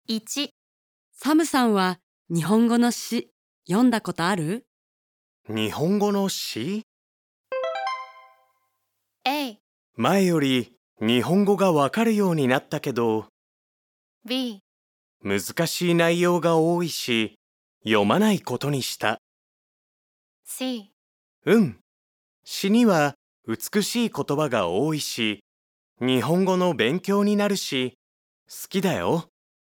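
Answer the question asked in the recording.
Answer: C: うん、詩には美しい言葉が多いし日本語の勉強になるし好きだよ。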